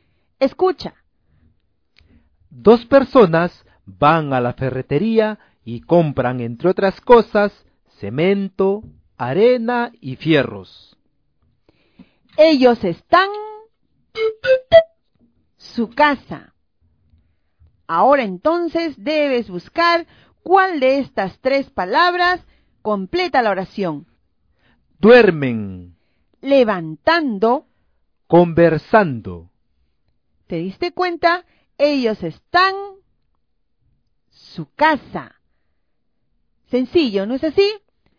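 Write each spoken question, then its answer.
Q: Ellos están... su casa.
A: Levantando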